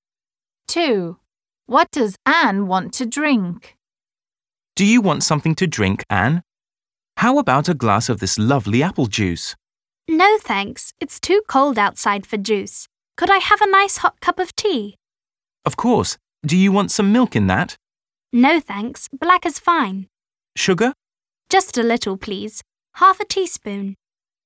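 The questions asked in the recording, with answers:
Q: What does Anne want to drink?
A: hot tea (black, a little sugar)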